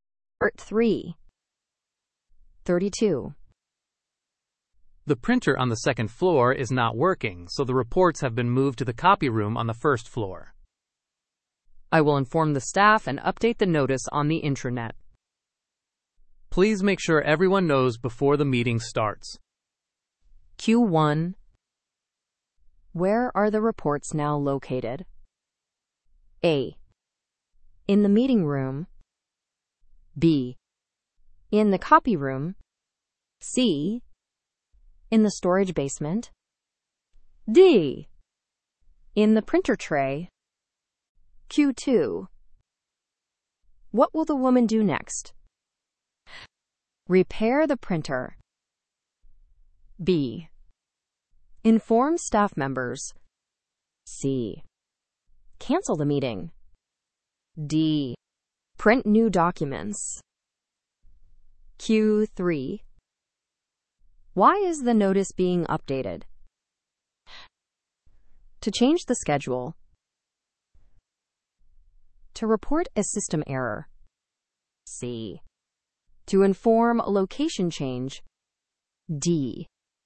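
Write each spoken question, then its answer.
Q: Where are the reports now located?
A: B: In the copy room.

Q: What will the woman do next?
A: B: Inform staff members.

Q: Why is the notice being updated?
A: C: To inform a location change.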